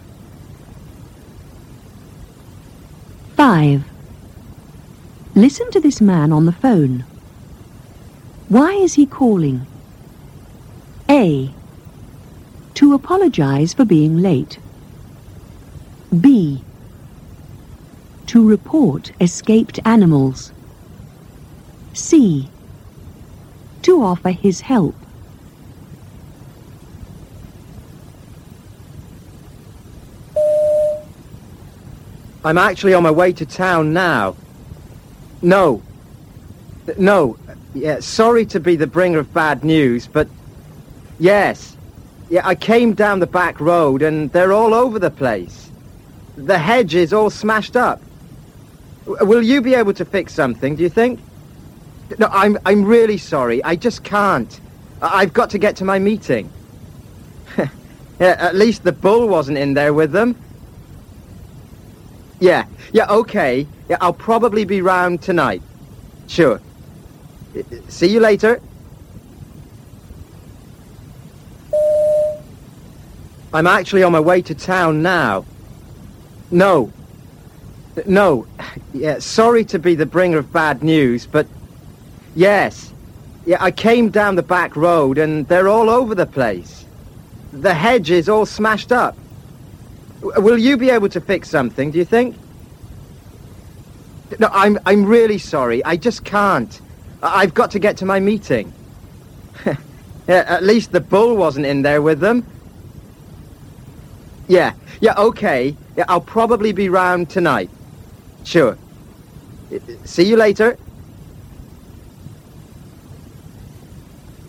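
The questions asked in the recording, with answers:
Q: Why is he calling? A. To apologize for being late. B. To report escaped animals. C. To offer his help.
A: B: To report escaped animals.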